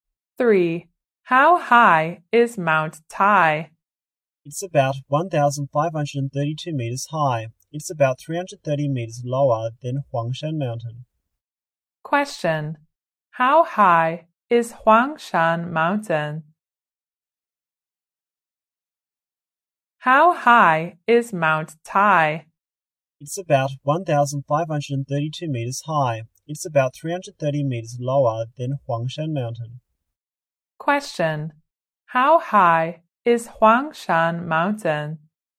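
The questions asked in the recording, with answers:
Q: How high is Huangshan Mountain?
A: About 1,862 meters.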